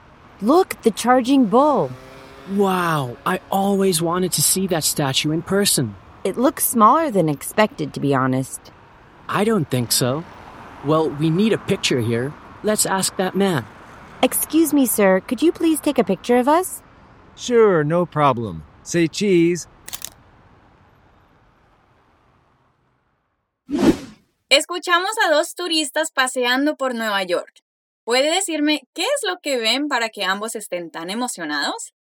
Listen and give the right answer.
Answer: Es por una estatua. En Nueva York hay una estatua muy famosa de un toro de bronce.